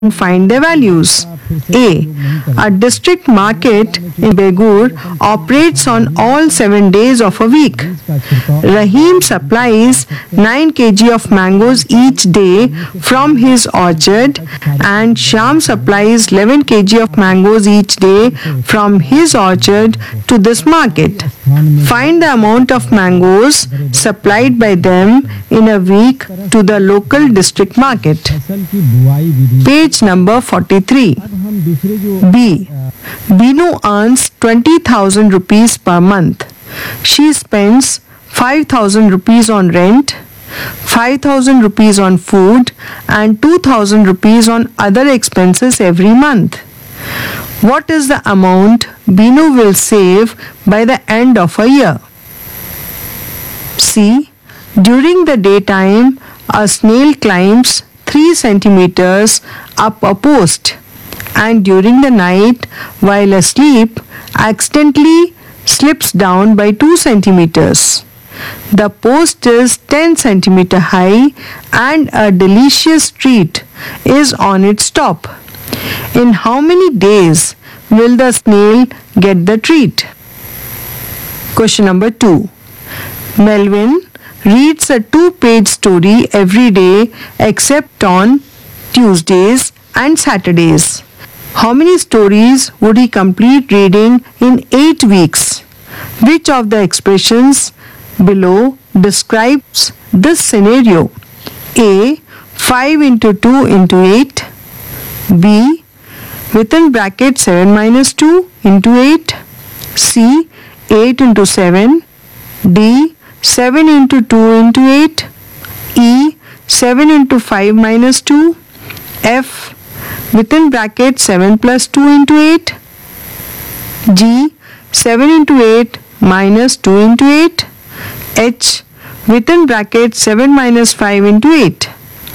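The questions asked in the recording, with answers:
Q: Find the amount of mangoes supplied by them in a week to the local district market.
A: 140 kg

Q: What is the amount Binu will save by the end of a year?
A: 96,000 rupees

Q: In how many days will the snail get the treat?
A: 8 days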